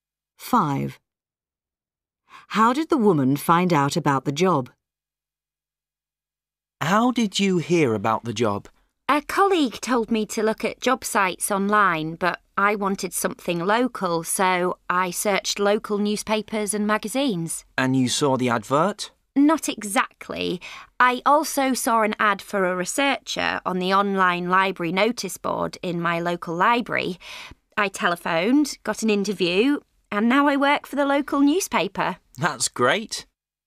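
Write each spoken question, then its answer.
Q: How did the woman find out about the job?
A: on the online library notice board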